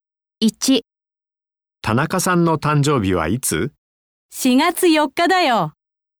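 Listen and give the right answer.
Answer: 4月4日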